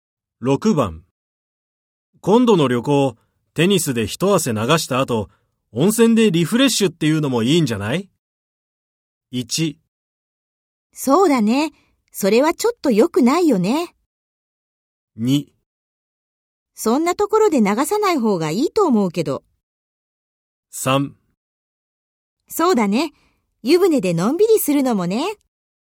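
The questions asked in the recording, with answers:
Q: 今度の旅行、テニスで一汗流した後、温泉でリフレッシュっていうのもいいんじゃない?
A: 3: そうだね、湯船でのんびりするのもね。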